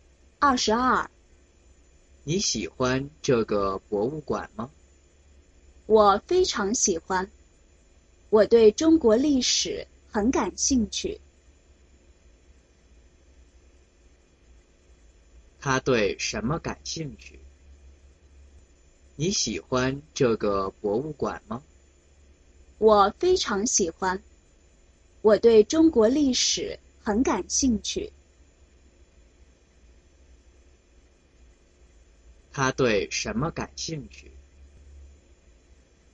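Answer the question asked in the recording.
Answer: 中国历史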